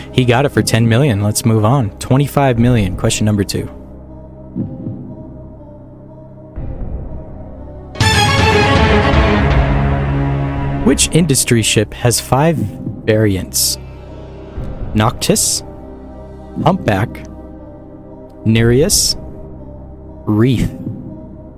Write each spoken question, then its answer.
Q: Which industry ship has five variants?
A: Indeed, that is right. Nereus has five variants.